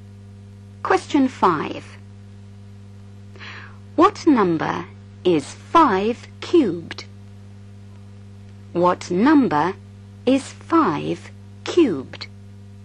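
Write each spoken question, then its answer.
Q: What number is 5 cubed?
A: 125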